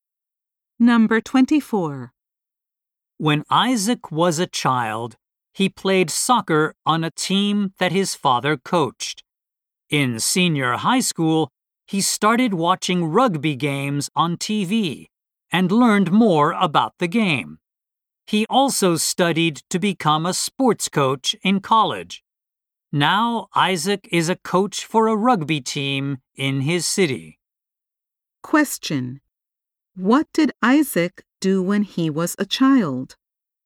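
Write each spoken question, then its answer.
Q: What did Isaac do when he was a child?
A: He played soccer on a team his father coached.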